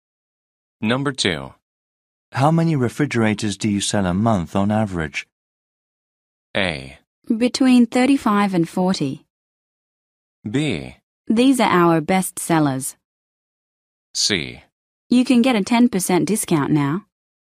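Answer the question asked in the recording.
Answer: A: Between 35 and 40.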